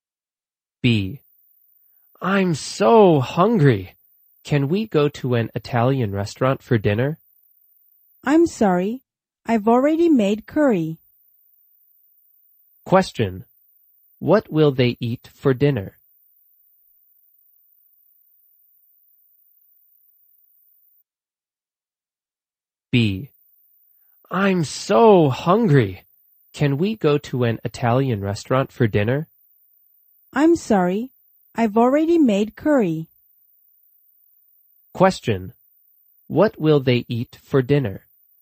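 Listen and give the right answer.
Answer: Curry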